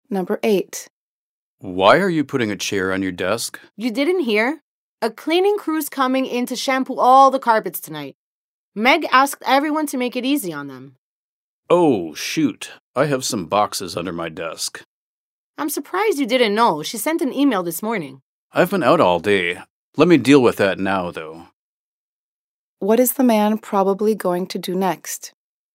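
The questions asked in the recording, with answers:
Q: What is the man probably going to do next?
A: Move the boxes from under his desk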